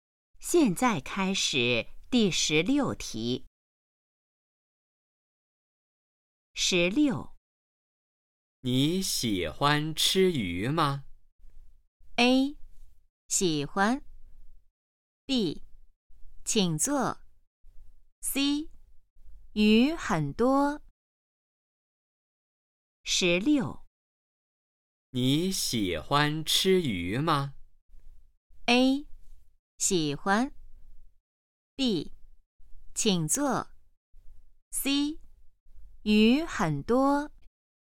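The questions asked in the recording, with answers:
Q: 你喜欢吃鱼吗?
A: A: 喜欢。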